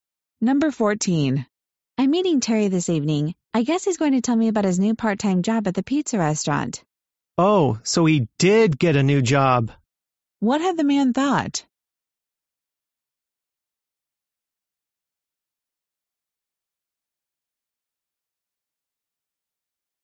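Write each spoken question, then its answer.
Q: What had the man thought?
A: That Terry had not gotten a new job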